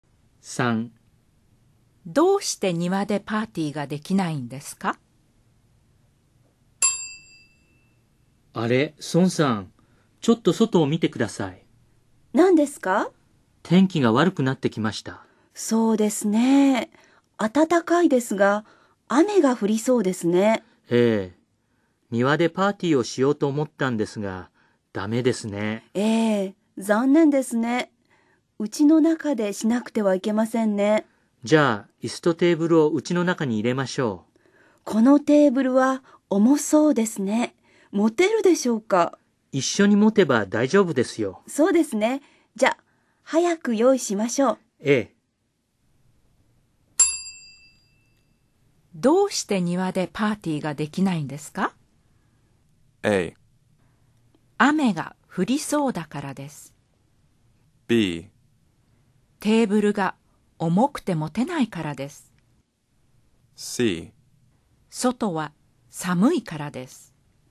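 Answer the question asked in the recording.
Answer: A: 雨が降りそうだからです。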